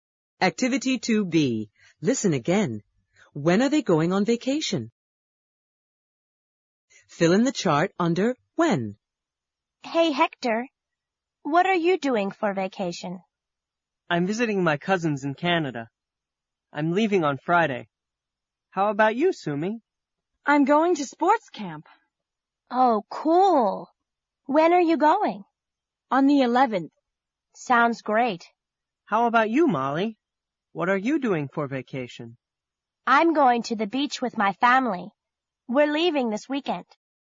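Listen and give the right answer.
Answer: Hector is leaving on Friday, Sumi is going on the 11th, and Molly is leaving this weekend.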